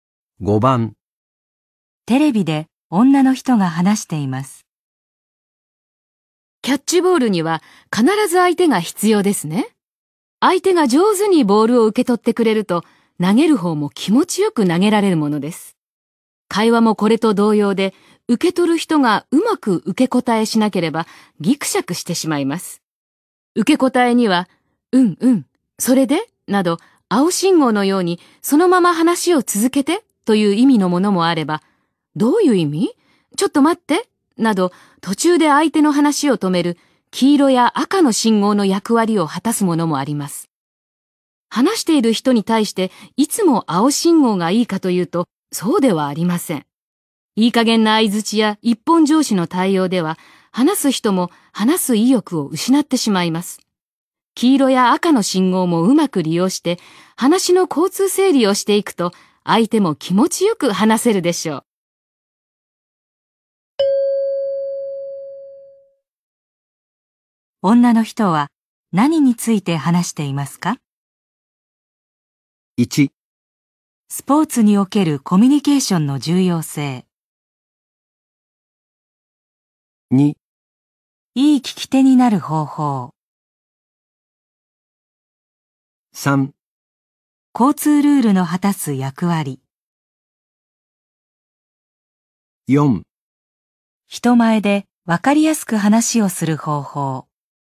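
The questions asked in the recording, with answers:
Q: 女の人は何について話していますか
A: 2: いい聞き手になる方法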